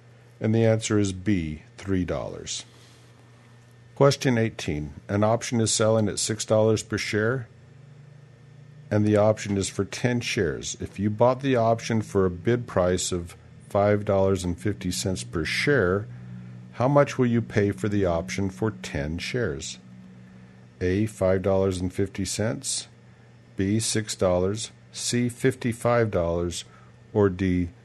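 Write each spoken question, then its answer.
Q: If you bought the option for a bid price of $5.50 per share, how much will you pay for the option for 10 shares?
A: C: $55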